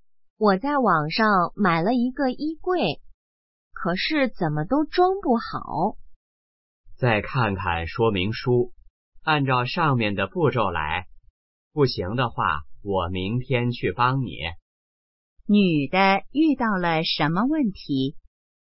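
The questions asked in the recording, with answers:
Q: 女的遇到了什么问题?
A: 网上买的衣柜装不好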